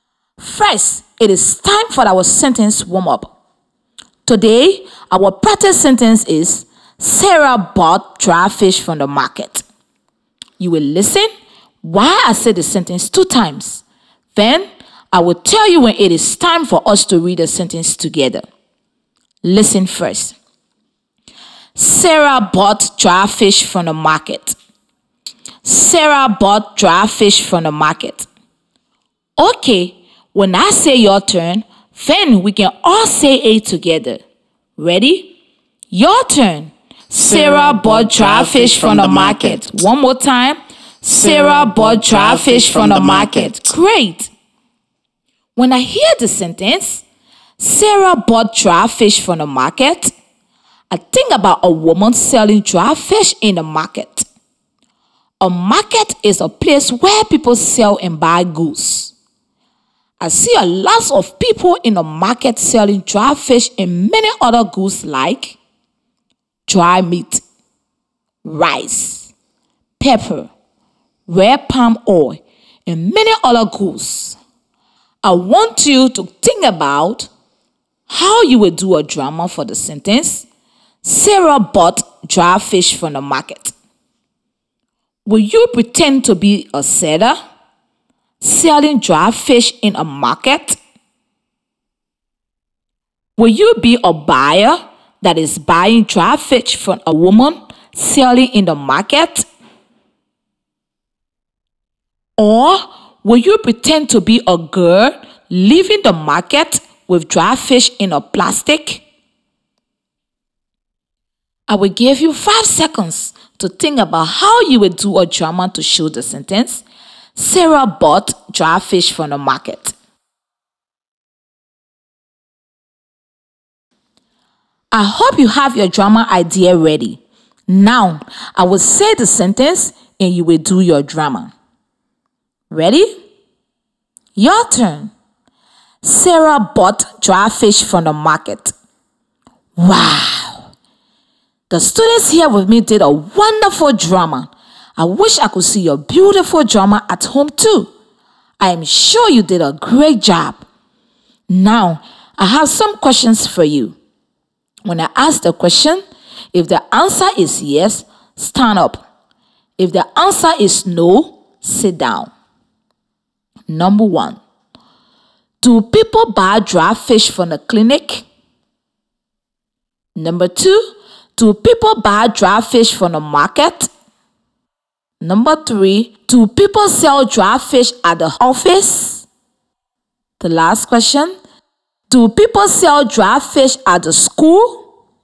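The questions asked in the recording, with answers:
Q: do people buy dry fish from the clinic?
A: No

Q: do people buy dry fish from the market?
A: Yes

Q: do people sell dry fish at the office?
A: No

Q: do people sell dry fish at the school?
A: No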